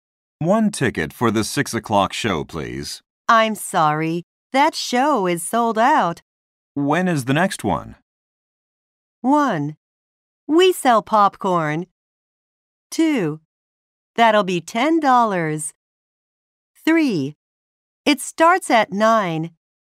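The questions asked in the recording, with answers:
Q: When is the next one?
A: 3: It starts at 9.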